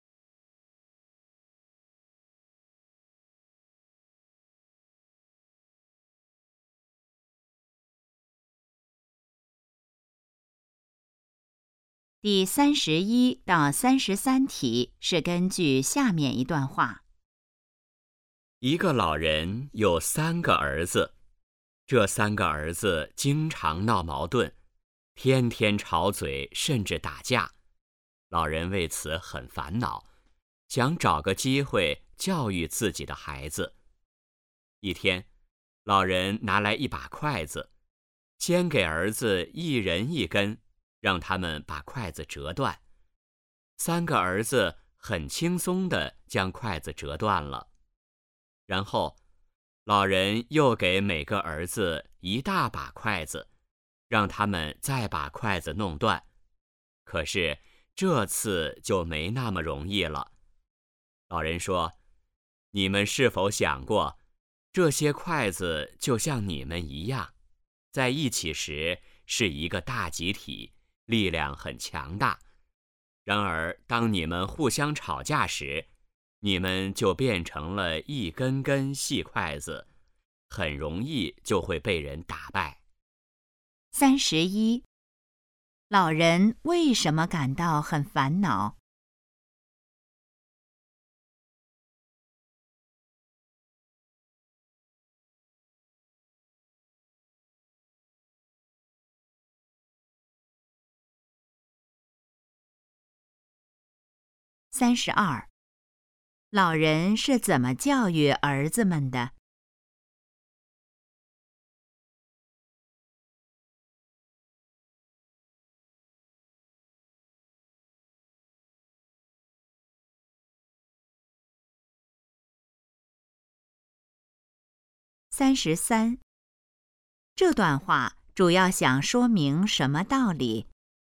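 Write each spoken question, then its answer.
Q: 老人为什么感到很烦恼?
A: 三个儿子经常闹矛盾

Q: 老人是怎么教育儿子们的?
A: 让他们折筷子

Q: 这段话主要想说明什么道理?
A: 团结力量大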